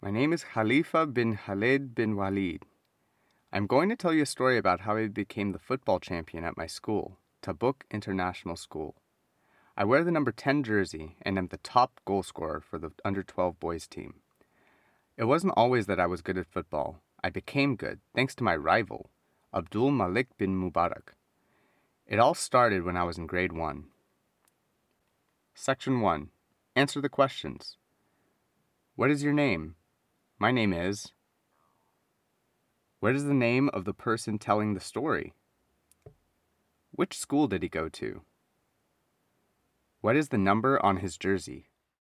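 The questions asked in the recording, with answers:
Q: What is the name of the person telling the story?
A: Khalifa bin Khaled bin Walid

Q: Which school did he go to?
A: Tabuk International School

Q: What is the number on his jersey?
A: 10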